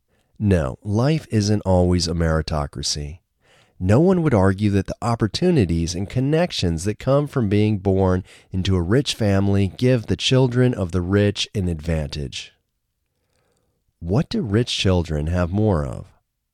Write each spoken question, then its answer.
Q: What do rich children have more of?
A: Rich children have more opportunities and connections.